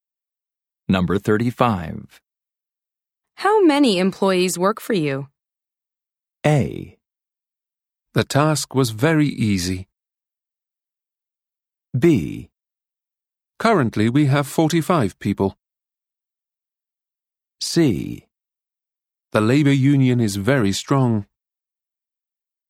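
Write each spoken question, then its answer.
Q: How many employees work for you?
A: B: Currently we have 45 people.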